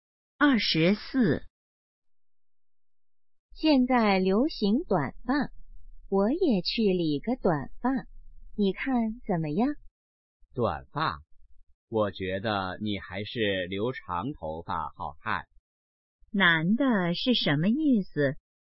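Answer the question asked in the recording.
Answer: 女的留长头发更好看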